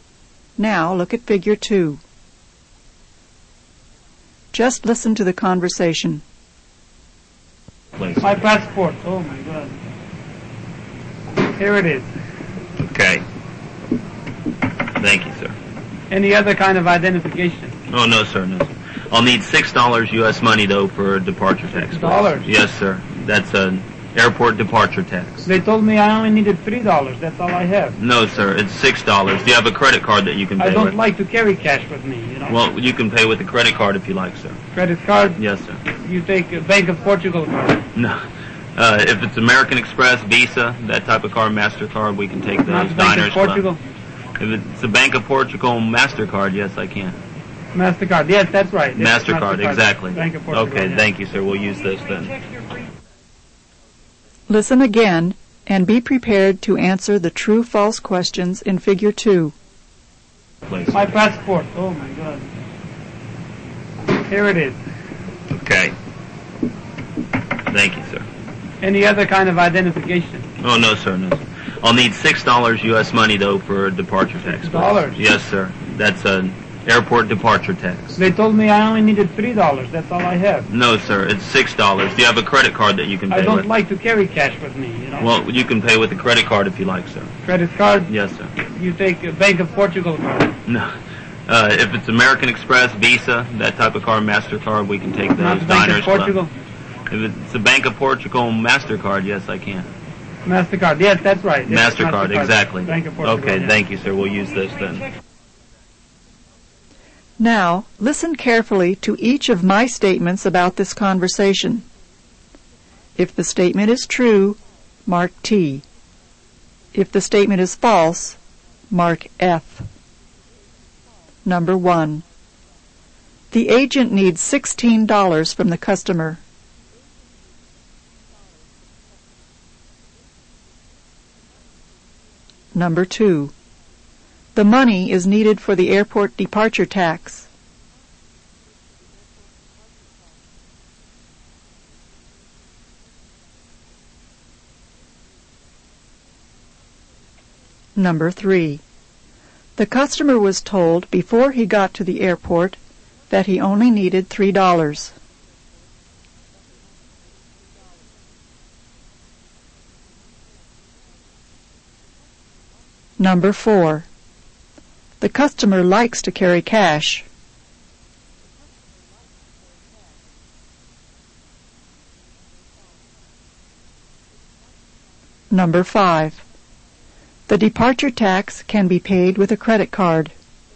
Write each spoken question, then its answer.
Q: The agent needs $16 from the customer.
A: Number 1 is false. The agent needs only $6, not $16.

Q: The money is needed for the airport departure tax.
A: Number 2 is true. The money is needed for the airport departure tax.

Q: The customer was told before he got to the airport that he only needed $3.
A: Number 3 is also true. The customer was told before he got to the airport that he only needed $3.

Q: The customer likes to carry cash.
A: Number 4 is false. The customer does not like to carry cash.

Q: The departure tax can be paid with a credit card.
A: Number 5 is true. The departure tax can be paid with a credit card.